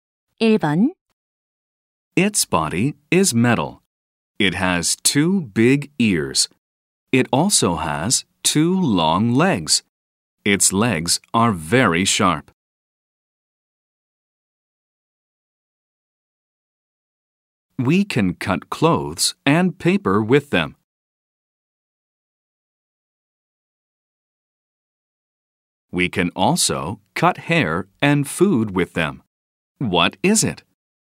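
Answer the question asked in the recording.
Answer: scissors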